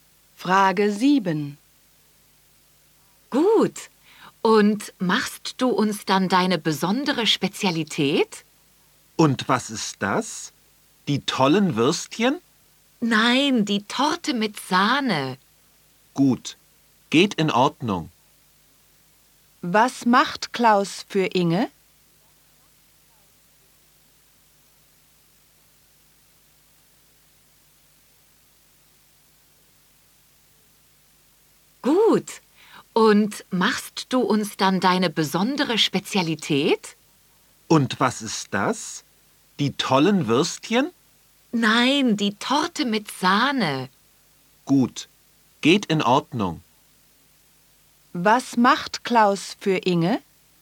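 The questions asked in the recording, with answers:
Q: Was macht Klaus für Inge?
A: Die Torte mit Sahne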